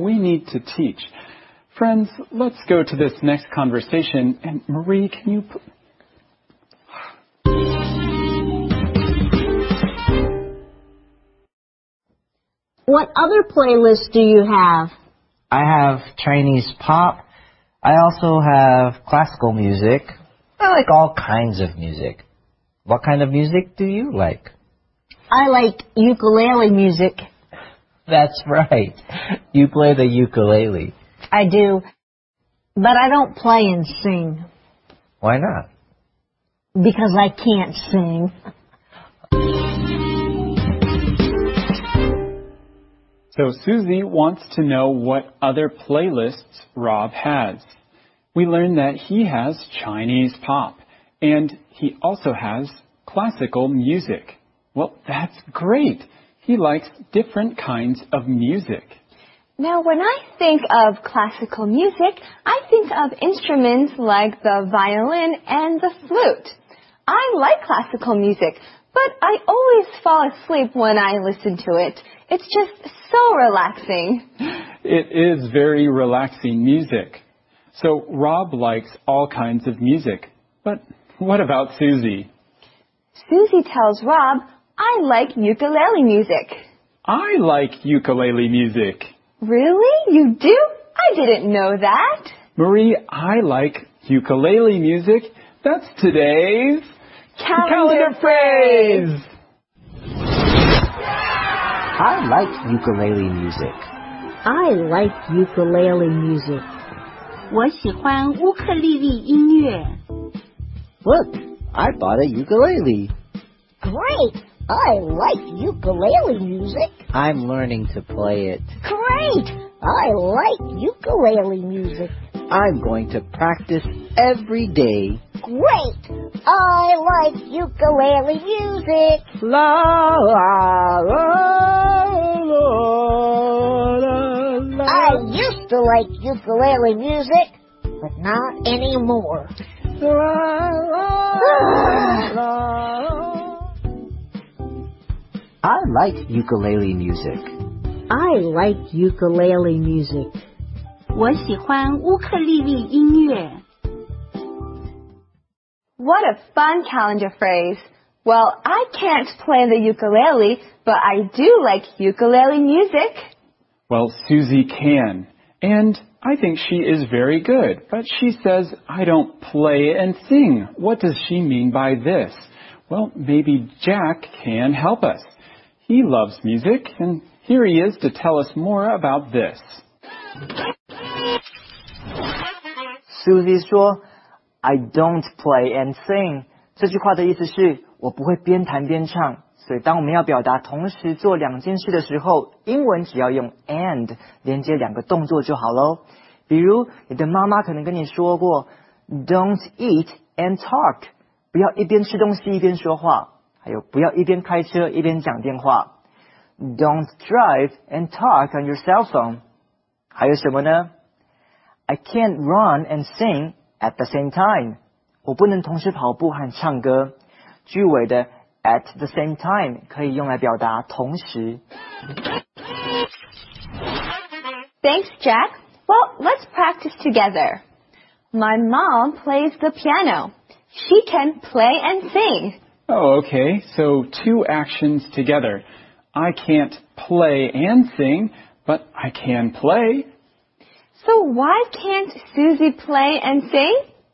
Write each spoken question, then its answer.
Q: So why can't Susie play and sing?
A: That's right, because she can't sing.